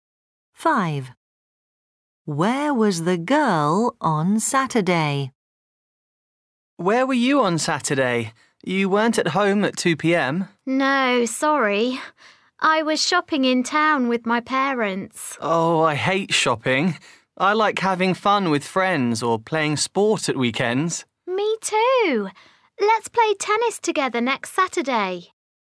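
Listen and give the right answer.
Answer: shopping in town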